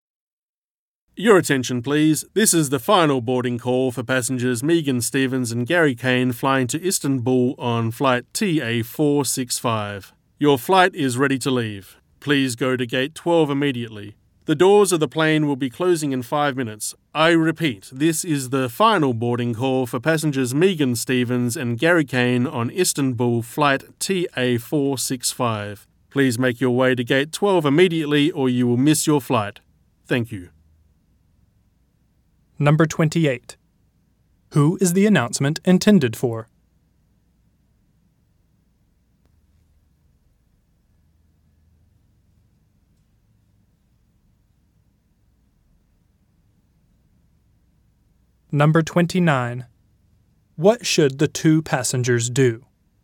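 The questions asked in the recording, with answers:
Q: Who is the announcement intended for?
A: Passengers Megan Stevens and Gary Kane flying to Istanbul on flight TA465

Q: What should the two passengers do?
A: Go to gate 12 immediately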